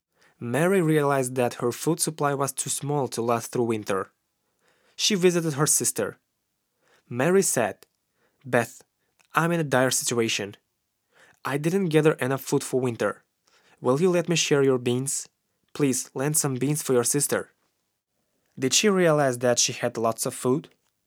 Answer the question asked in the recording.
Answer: No, she didn't realize that she had lots of food.